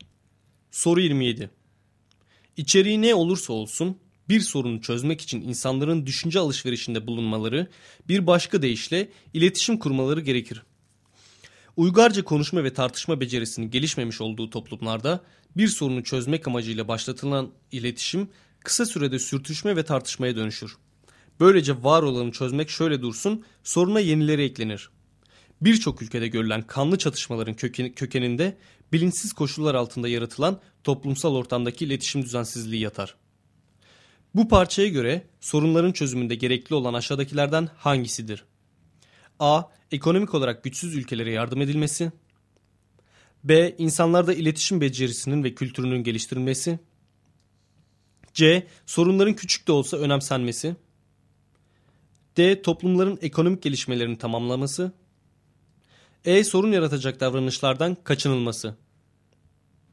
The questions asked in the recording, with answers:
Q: Bu parçaya göre sorunların çözümünde gerekli olan aşağıdakilerden hangisidir?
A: Doğru cevap B şıkkı.